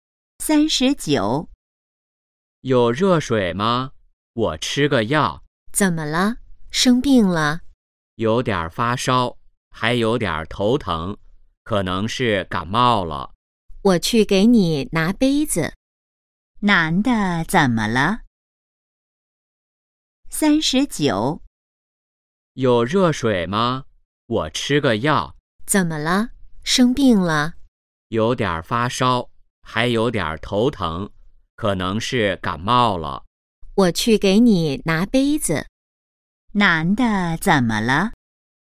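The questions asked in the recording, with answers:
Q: 男的怎么了?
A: 感冒了(发烧、头疼)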